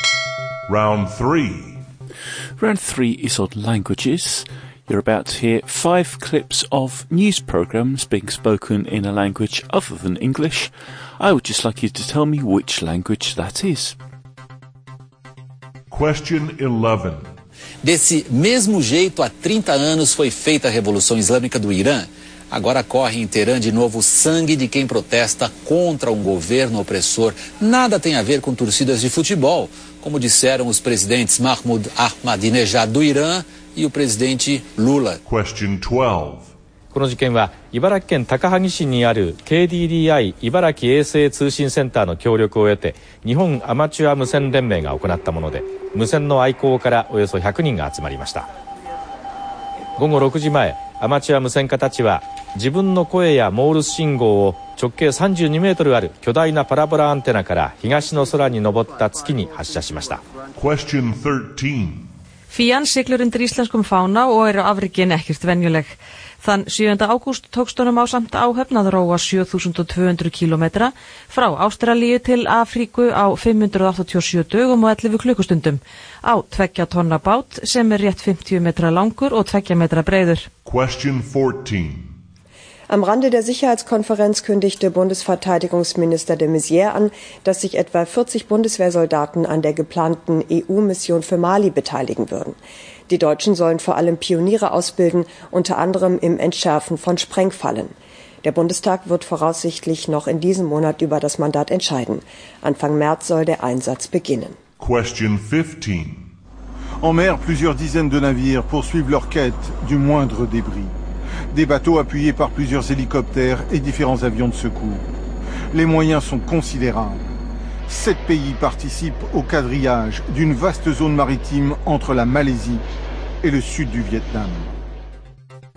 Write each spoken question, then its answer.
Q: I would just like you to tell me which language that is.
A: the answer to number 11 was Portuguese

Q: I would just like you to tell me which language that is.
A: Number 12 was Japanese.

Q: I would just like you to tell me which language that is.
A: Number 13, well done if you got it, Icelandic.

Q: I would just like you to tell me which language that is.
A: Number 14 was German.

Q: I would just like you to tell me which language that is.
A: And number 15, French.